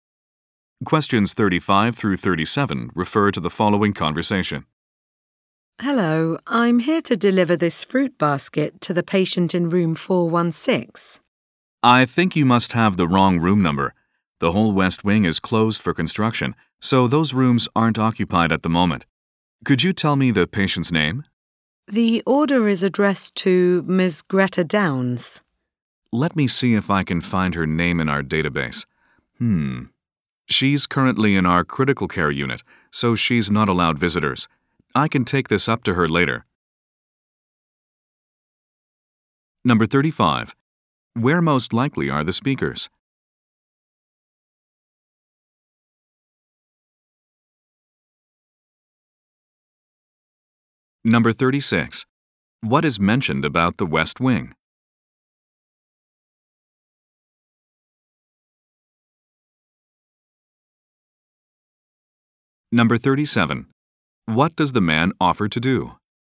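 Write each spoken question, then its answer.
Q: Where most likely are the speakers?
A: At a hospital

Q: What is mentioned about the West Wing?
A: It is closed for construction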